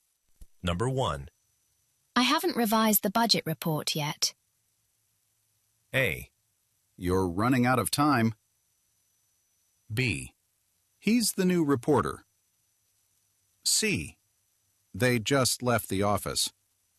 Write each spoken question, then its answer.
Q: I haven't revised the budget report yet.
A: 네, A번처럼 맞장구 쳐주는 거 괜찮겠죠, 그죠?